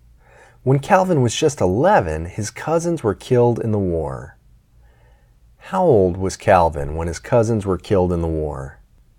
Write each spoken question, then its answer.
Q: How old was Calvin when his cousins were killed in the war?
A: Calvin was just 11 when his cousins were killed in the war.